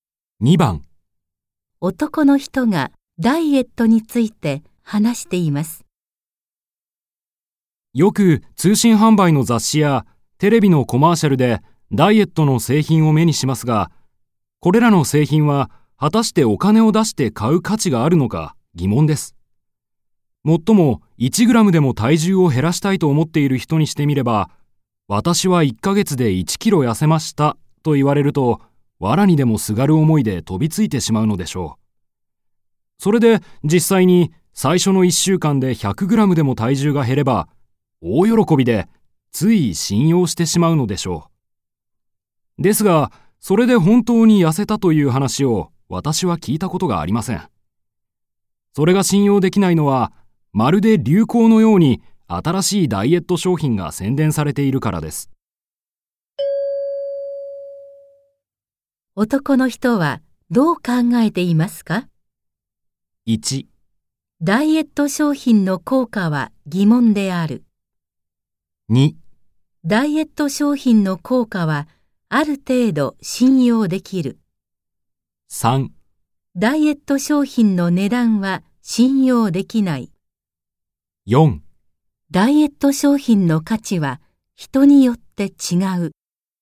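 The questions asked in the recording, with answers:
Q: 男の人はどう考えていますか ?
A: 1: ダイエット商品の効果は疑問である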